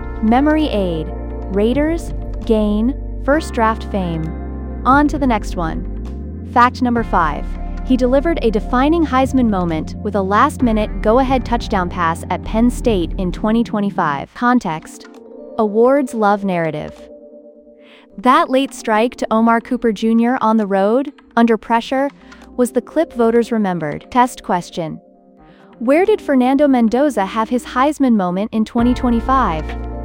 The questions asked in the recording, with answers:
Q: where did Fernando Mendoza have his Heisman moment in 2025?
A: Penn State.